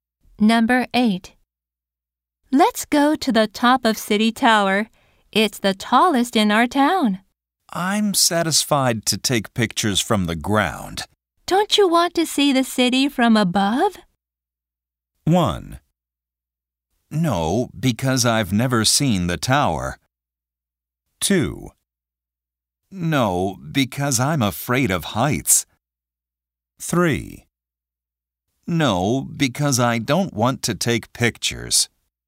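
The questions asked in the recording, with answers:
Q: Don't you want to see the city from above?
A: 2: No, because I'm afraid of heights.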